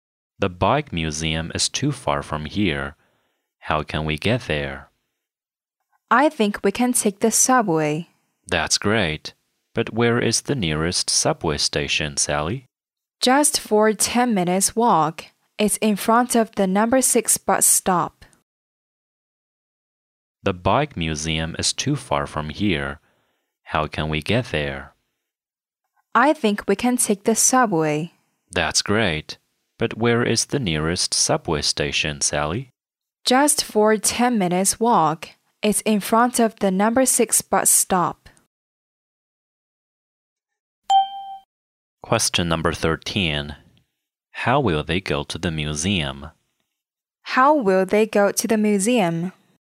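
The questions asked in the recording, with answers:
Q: How will they go to the museum?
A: By subway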